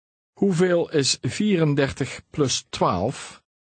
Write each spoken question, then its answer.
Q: Hoeveel is 34 plus 12?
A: 46. 46.